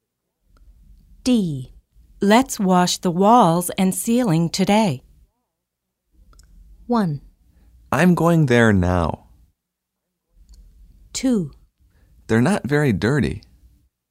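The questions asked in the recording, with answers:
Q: Let's wash the walls and ceiling today.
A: 2: They're not very dirty.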